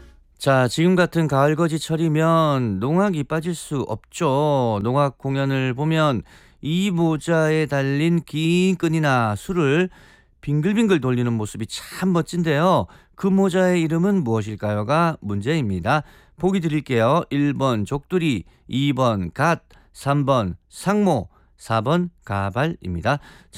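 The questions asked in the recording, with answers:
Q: 그 모자의 이름은 무엇일까요가 문제입니다.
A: 3: 상모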